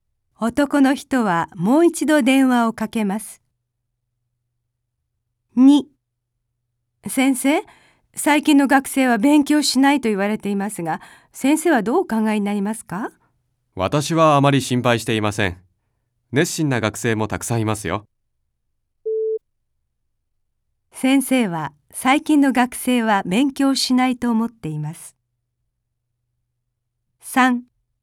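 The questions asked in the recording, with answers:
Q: 先生は最近の学生は勉強しないと思っています。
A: いいえ(熱心な学生もたくさんいると思っています)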